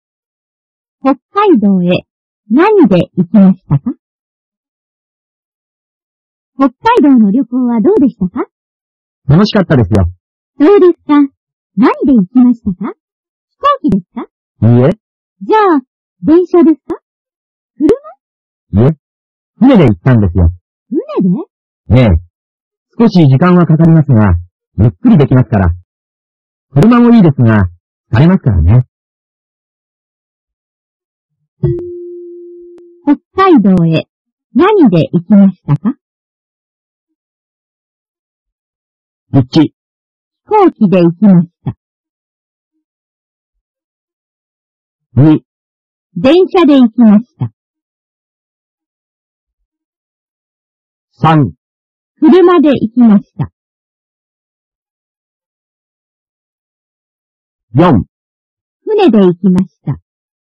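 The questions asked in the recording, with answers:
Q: 北海道へ何で行きましたか?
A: 4: 船で行きました。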